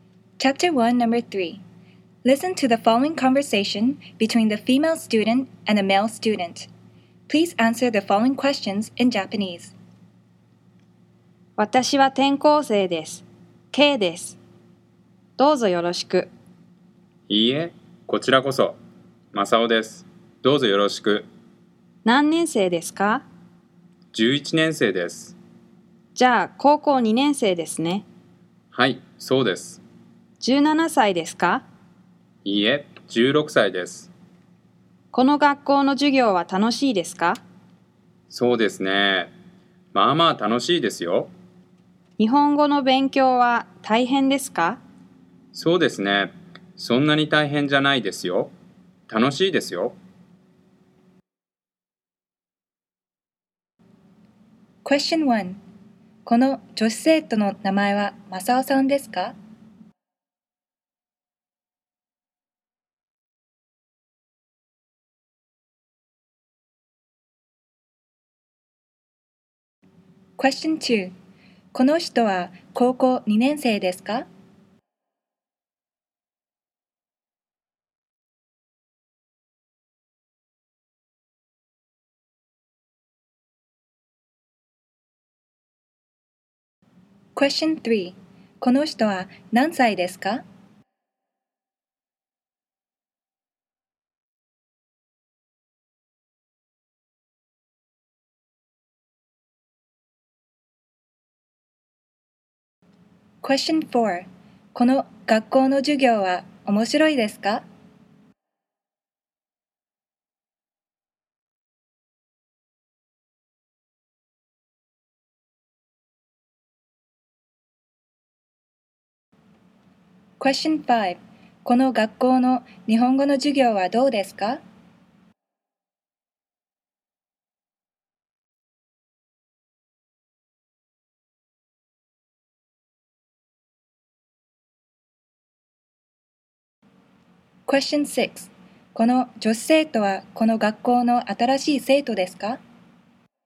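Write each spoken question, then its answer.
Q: この女子生徒の名前はマサオさんですか?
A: いいえ、Kさんです。

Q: この女子生徒はこの学校の新しい生徒ですか?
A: はい、転校生です。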